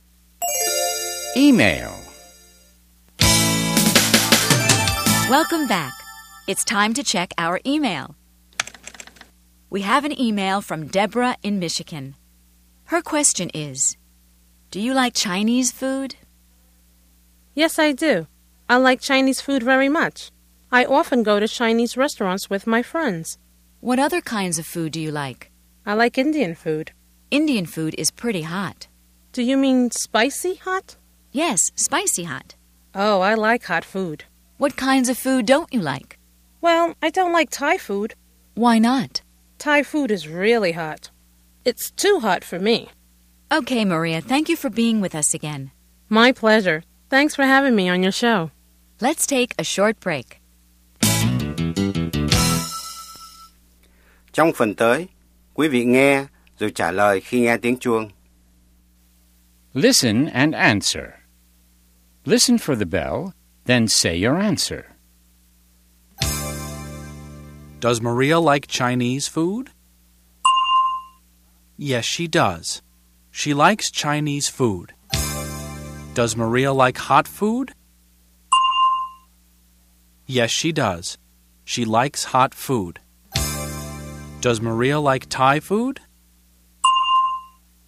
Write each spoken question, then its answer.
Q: Does Maria like Chinese food?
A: Yes, she does. She likes Chinese food.

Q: Does Maria like Thai food?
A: No, she doesn't. Thai food is too hot for her.